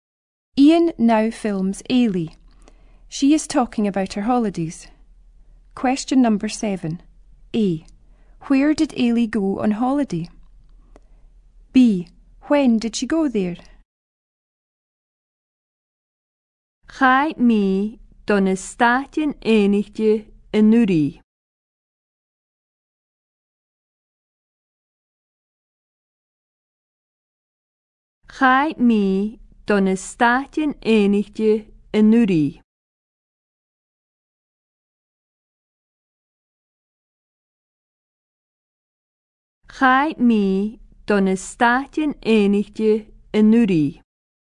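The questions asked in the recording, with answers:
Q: Where did Ailey go on holiday?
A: The United States

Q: When did she go there?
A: Last year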